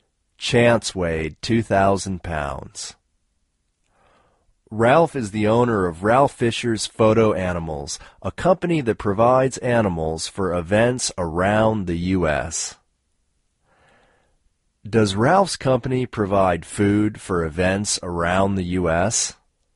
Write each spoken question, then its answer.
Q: Does Ralph's company provide food for events around the U.S.?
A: No. Ralph's company doesn't provide food for events around the U.S.